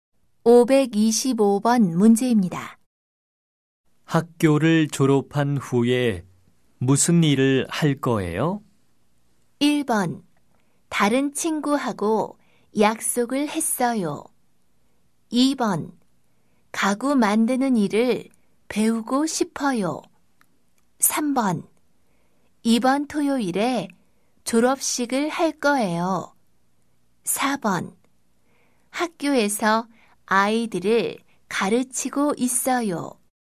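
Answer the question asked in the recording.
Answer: 2: 가구 만드는 일을 배우고 싶어요.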